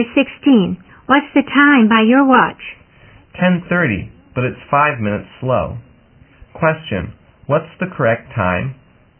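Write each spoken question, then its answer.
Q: Question, what's the correct time?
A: 10:35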